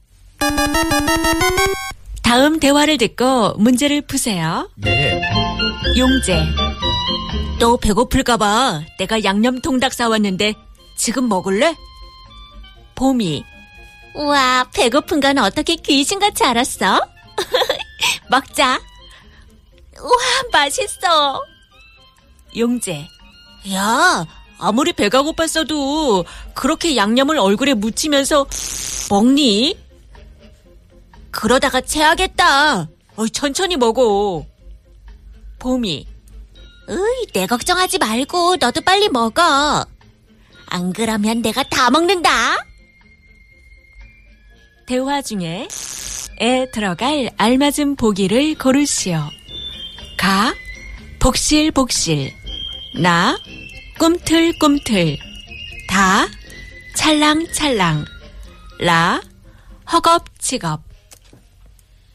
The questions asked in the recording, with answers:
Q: 대화 중에 에 들어갈 알맞은 보기를 고르시오.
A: The answer was 허겁지겁스.